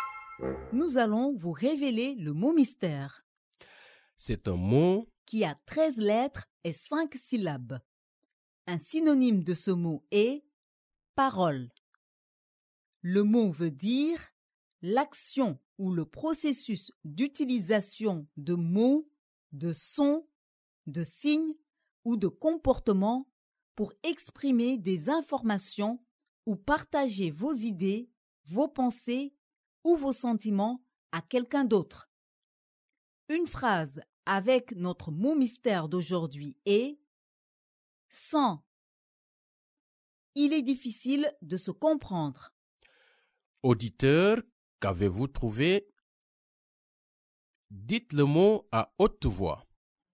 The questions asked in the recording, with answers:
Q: Auditeur, qu'avez-vous trouvé?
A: Le mot mystère d'aujourd'hui est « communication ».